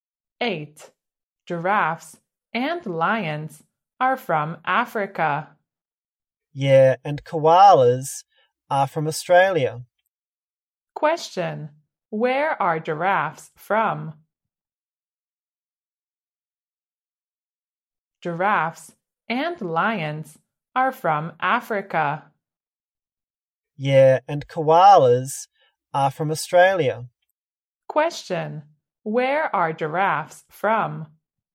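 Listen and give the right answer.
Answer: Africa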